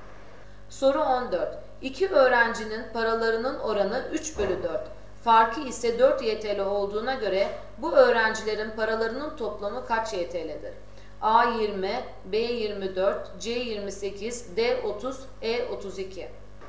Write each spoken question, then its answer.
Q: Farkı ise 4 YTL olduğuna göre bu öğrencilerin paralarının toplamı kaç YTL'dir?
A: Doğru cevap C28.